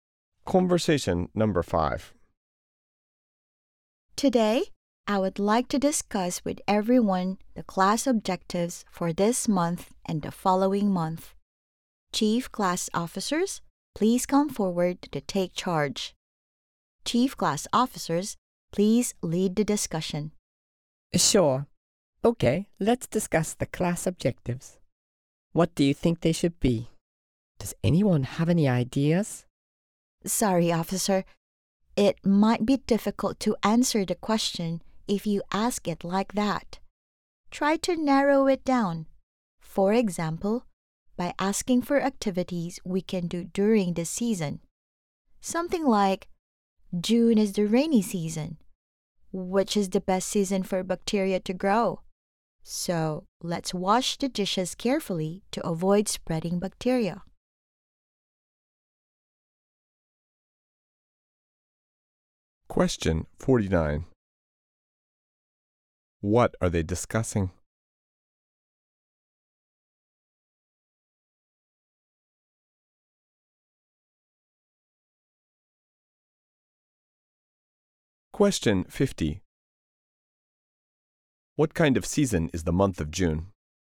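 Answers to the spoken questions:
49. The class objectives for this month and next month
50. The rainy season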